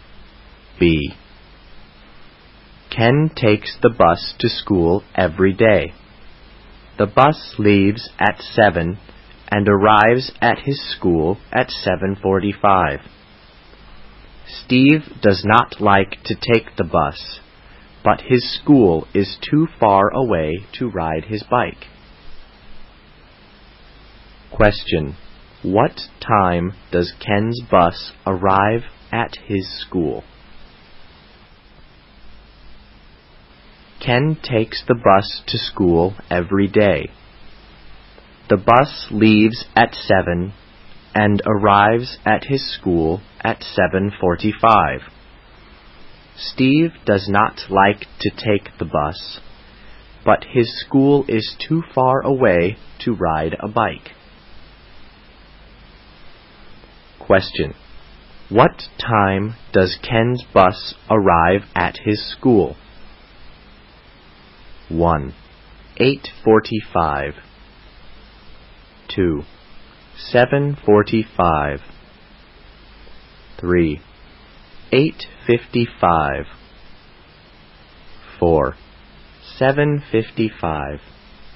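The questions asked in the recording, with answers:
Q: What time does Ken's bus arrive at his school?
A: 2: 7:45.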